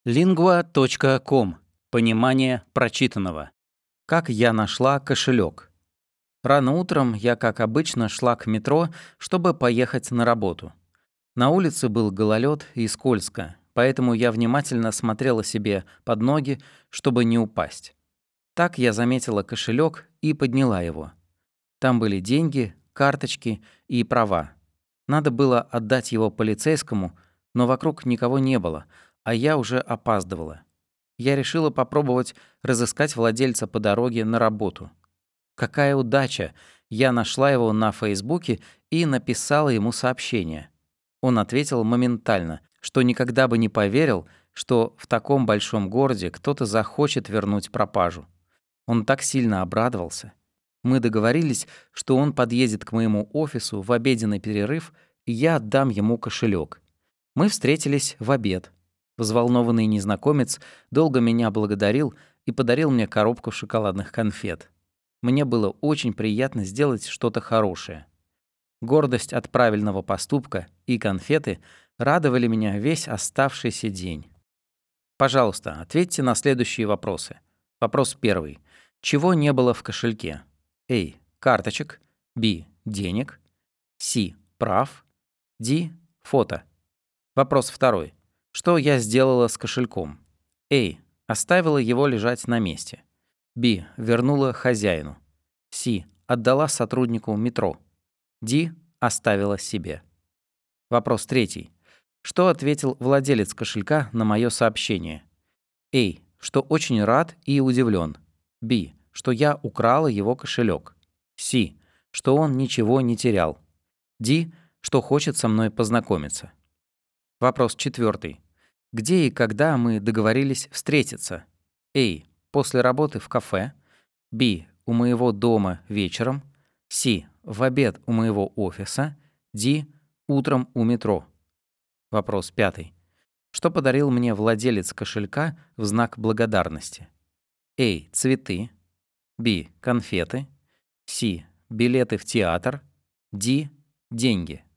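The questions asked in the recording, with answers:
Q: Чего не было в кошельке?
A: D: Фото

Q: Что я сделала с кошельком?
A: B: Вернула хозяину

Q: Что ответил владелец кошелька на мое сообщение?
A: A: Что очень рад и удивлен

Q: Где и когда мы договорились встретиться?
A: C: В обед у моего офиса

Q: Что подарил мне владелец кошелька в знак благодарности?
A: B: Конфеты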